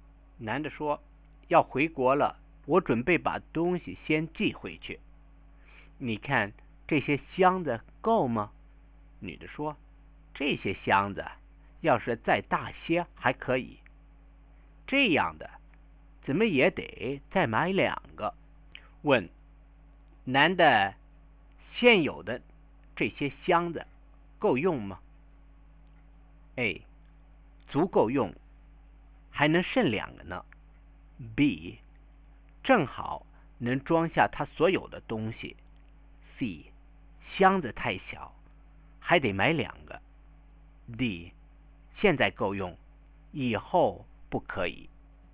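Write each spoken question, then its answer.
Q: 问男的,现有的这些箱子够用吗?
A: C: 箱子太小,还得买两个。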